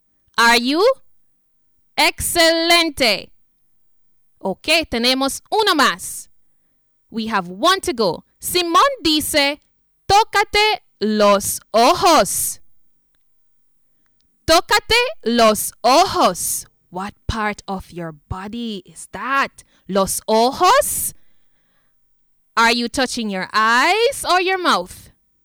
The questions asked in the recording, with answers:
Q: Are you touching your eyes or your mouth?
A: Ah, if you're touching your eyes, you are correct.